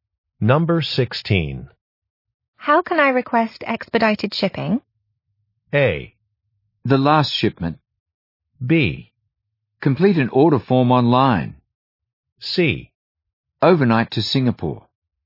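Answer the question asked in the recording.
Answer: B: Complete an order form online.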